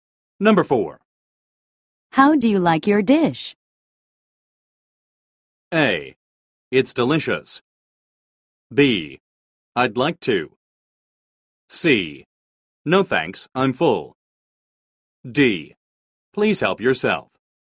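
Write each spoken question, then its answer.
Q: How do you like your dish?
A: A: It's delicious.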